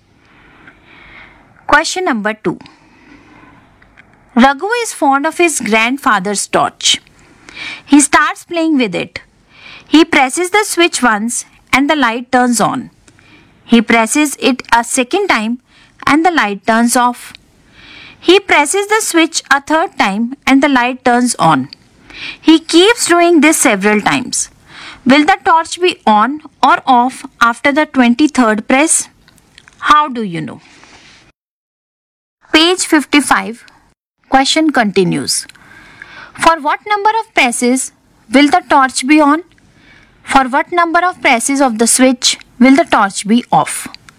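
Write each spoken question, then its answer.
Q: Will the torch be on or off after the 23rd press?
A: On

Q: For what number of presses will the torch be on?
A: Odd numbers of presses

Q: For what number of presses of the switch will the torch be off?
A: Even numbers of presses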